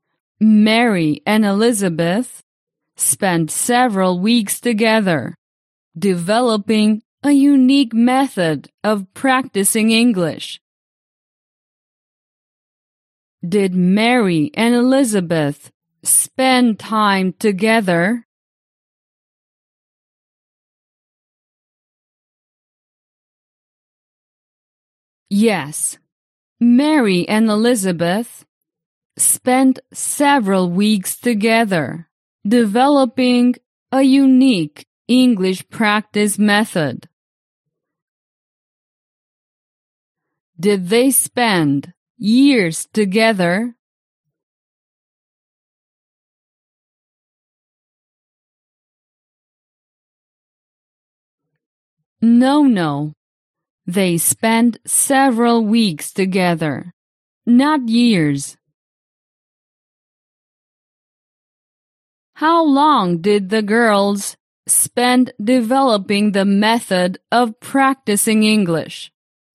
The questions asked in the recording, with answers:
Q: How long did the girls spend developing the method of practicing English?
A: They spent several weeks developing the method of practicing English.